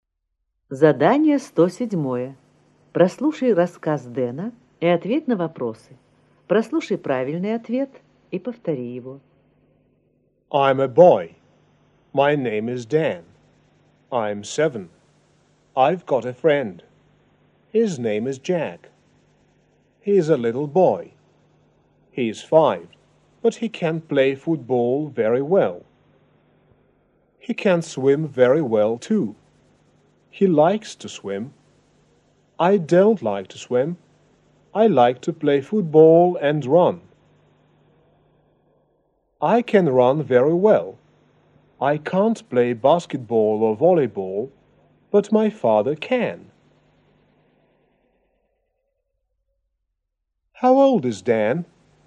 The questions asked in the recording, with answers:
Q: How old is Dan?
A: He is 7.